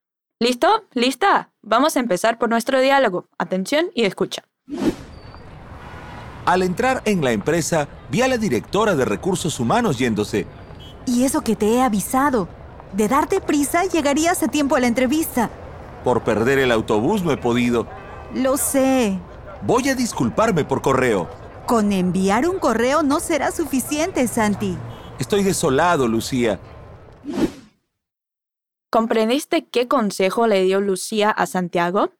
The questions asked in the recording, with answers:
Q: ¿Comprendiste qué consejo le dio Lucía a Santiago?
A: De darte prisa, llegarías a tiempo a la entrevista.